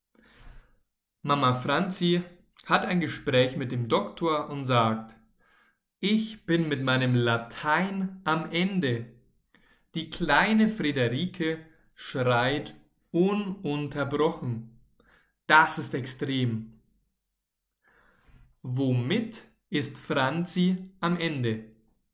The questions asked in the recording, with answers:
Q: Womit ist Franzi am Ende?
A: mit ihrem Latein. Franzi ist mit ihrem Latein am Ende.